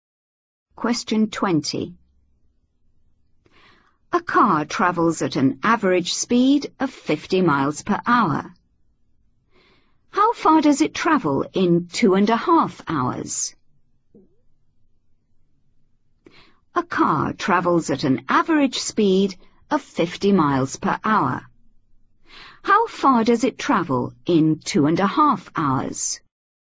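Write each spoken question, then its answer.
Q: How far does it travel in 2.5 hours?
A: 125 miles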